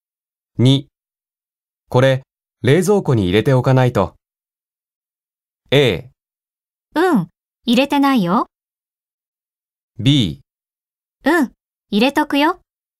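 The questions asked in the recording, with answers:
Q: これ、冷蔵庫に入れておかないと。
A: B: うん、入れとくよ。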